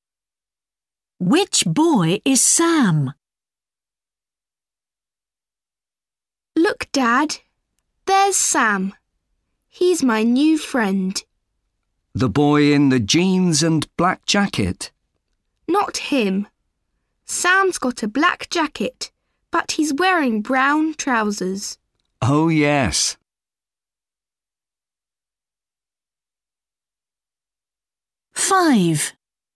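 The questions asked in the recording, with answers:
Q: Which boy is Sam?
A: The boy in the black jacket and brown trousers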